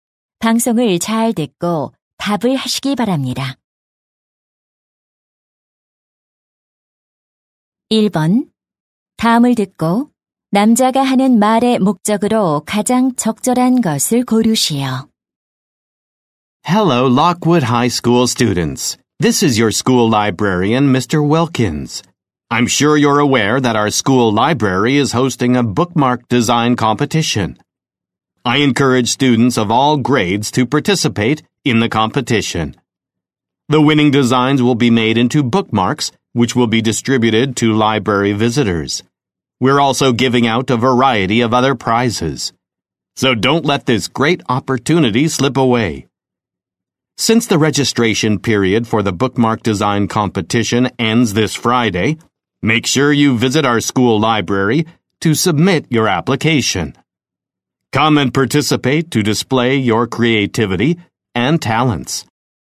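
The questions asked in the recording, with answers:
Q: 다음을 듣고 남자가 하는 말의 목적으로 가장 적절한 것을 고르시오.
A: 책갈피 디자인 대회 참가를 독려하려고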